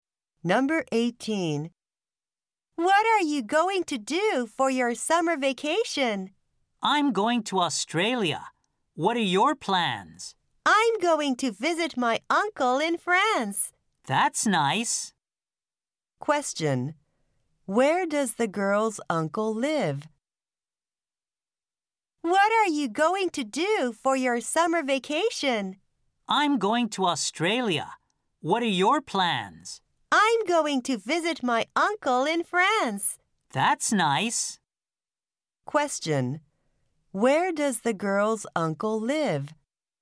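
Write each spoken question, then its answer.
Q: Where does the girl's uncle live?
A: In France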